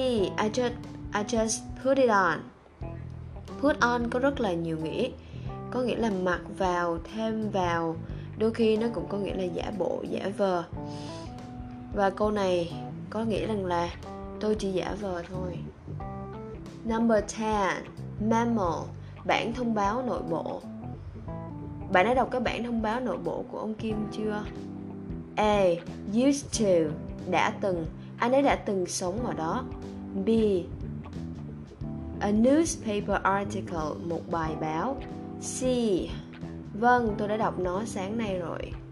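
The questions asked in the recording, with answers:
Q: bạn đã đọc cái bản thông báo nội bộ của ông Kim chưa?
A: C: vâng tôi đã đọc nó sáng nay rồi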